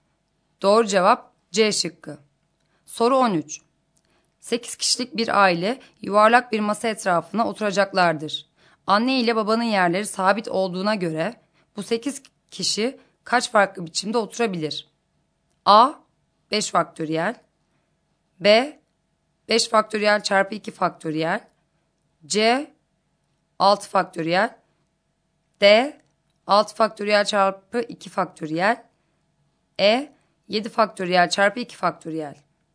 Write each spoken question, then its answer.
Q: Anne ile babanın yerleri sabit olduğuna göre bu 8 kişi kaç farklı biçimde oturabilir?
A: Doğru cevap C şıkkı.